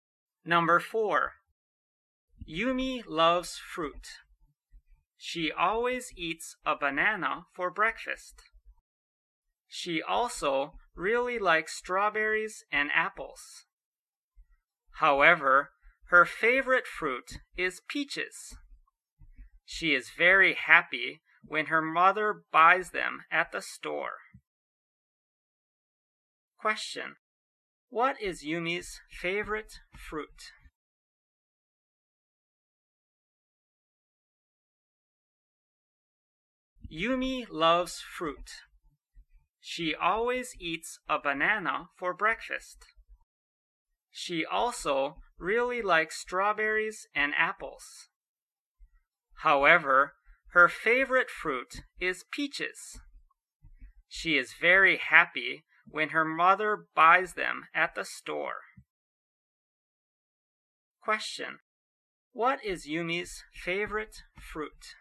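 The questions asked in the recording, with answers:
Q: What is Yumi's favorite fruit?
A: Peaches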